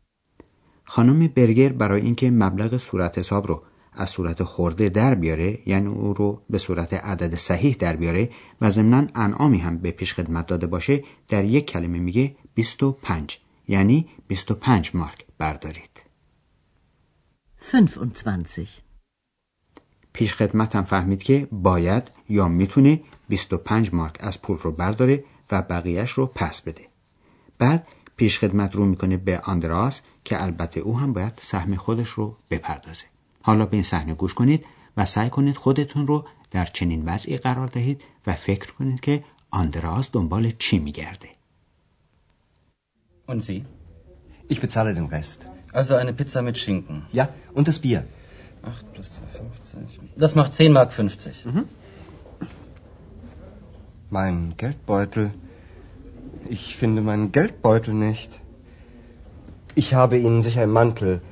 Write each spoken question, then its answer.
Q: فکر کنید که آندراز دنبال چی میگرده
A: یعنی در کیف پوله که آندراس الان همین کیف پولش رو پیدا نمیکنه